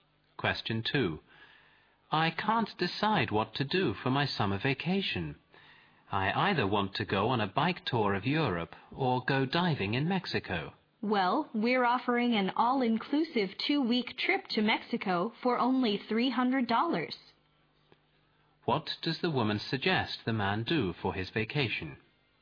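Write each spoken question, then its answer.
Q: What does the woman suggest the man do for his vacation?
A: Take the all-inclusive 2-week trip to Mexico for $300.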